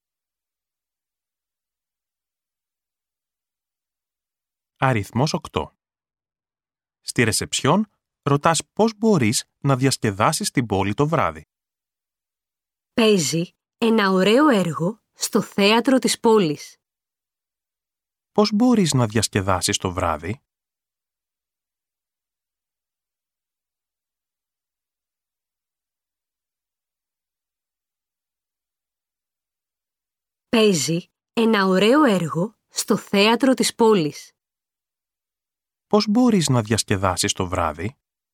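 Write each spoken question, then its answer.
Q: Πώς μπορείς να διασκεδάσεις το βράδυ?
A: Να δεις ένα έργο στο θέατρο της πόλης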